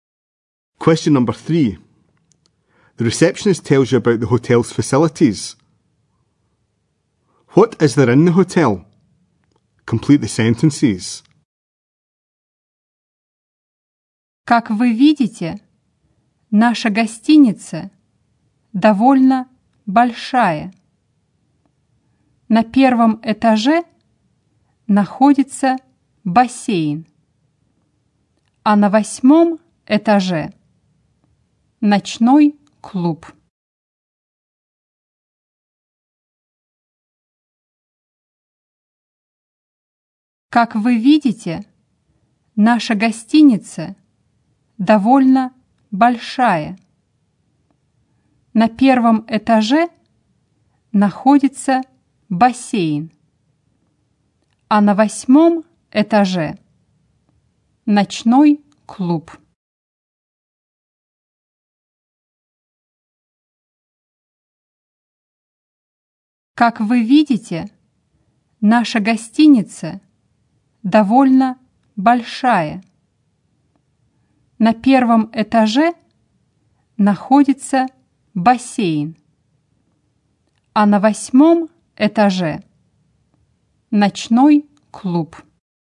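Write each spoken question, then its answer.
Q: What is there in the hotel?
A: A swimming pool on the first floor and a nightclub on the eighth floor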